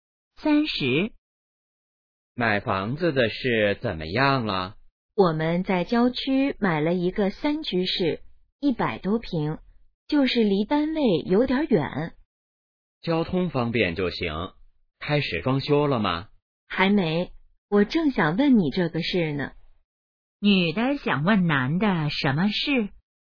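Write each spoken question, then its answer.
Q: 女的想问男的什么事?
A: 装修的事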